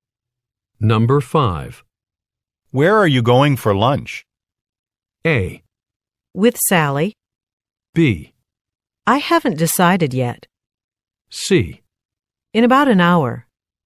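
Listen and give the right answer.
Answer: B: I haven't decided yet.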